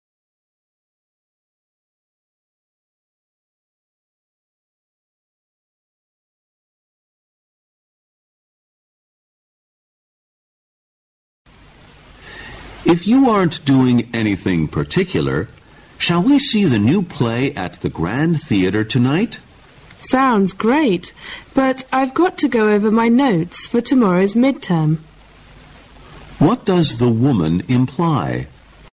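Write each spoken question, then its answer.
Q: What does the woman imply?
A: She can't go to the play because she has to study for tomorrow's midterm.

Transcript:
[听力原文] W: If you aren't doing anything particular, shall we see the new play at the Grand Theater tonight? M: Sounds great. But I've got to go over my notes for tomorrow's midterm.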